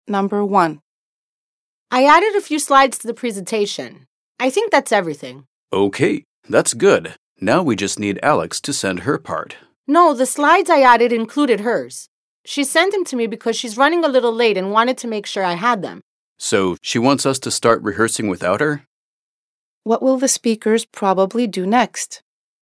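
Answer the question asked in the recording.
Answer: Start rehearsing the presentation without Alex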